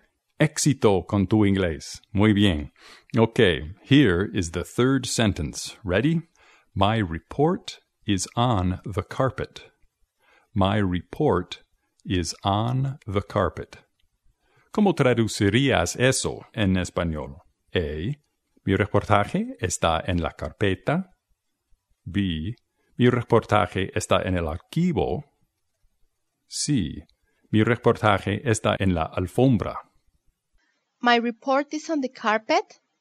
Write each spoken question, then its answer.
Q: ¿Cómo traducirías eso en español?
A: In Spanish, you would say, mi reportaje está en la alfombra.